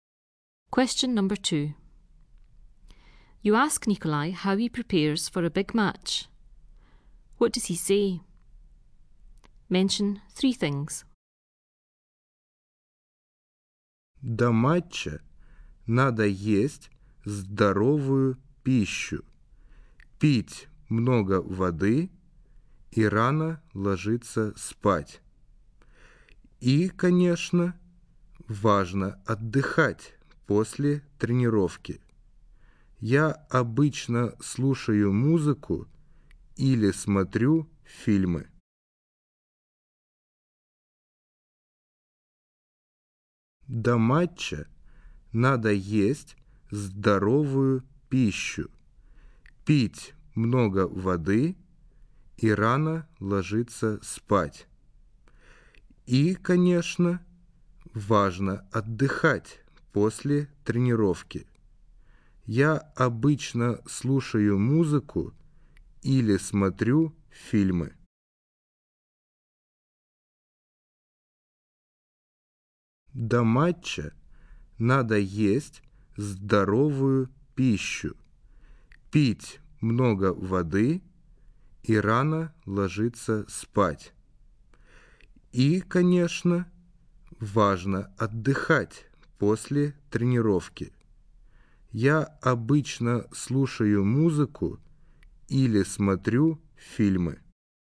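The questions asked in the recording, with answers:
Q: What does he say? Mention three things.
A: Eat healthy food, drink lots of water, go to bed early (also rest; listen to music or watch films after training)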